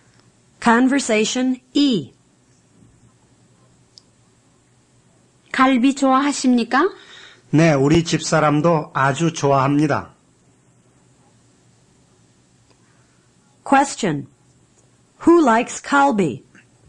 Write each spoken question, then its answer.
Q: Who likes kalbi?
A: Both he and his wife like kalbi.